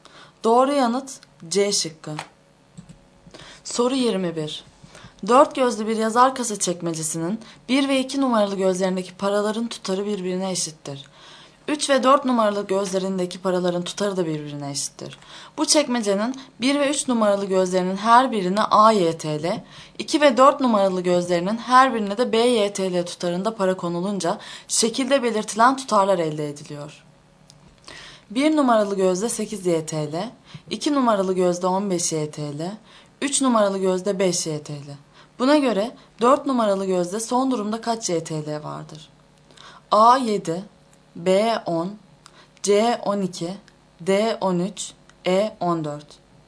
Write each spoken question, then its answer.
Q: Buna göre 4 numaralı gözde son durumda kaç YTL vardır?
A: Doğru yanıt C şıkkı.